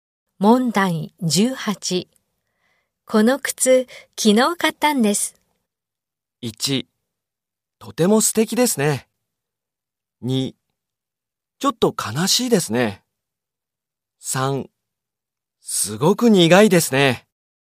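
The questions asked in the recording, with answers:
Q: この靴、昨日買ったんです。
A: 3: とても素敵ですね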